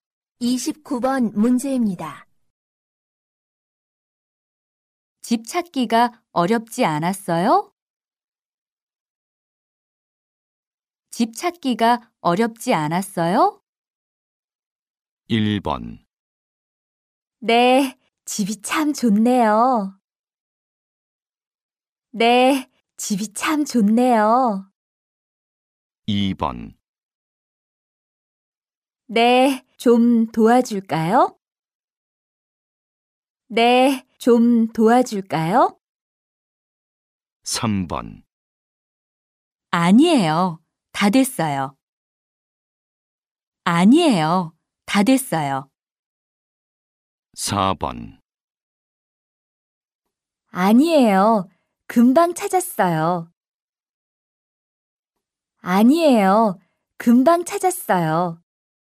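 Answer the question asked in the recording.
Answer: 4: 아니에요. 금방 찾았어요.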